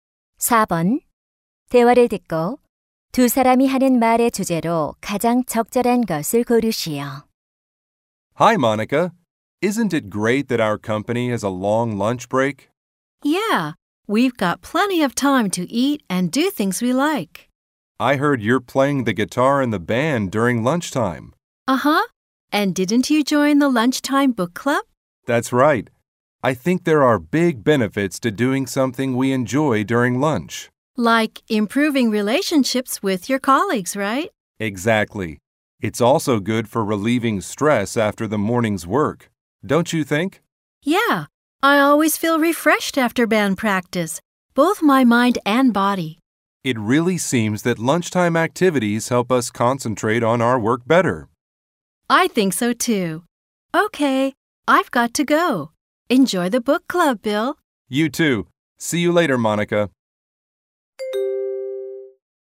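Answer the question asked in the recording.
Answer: 점심시간 여가 활동의 이점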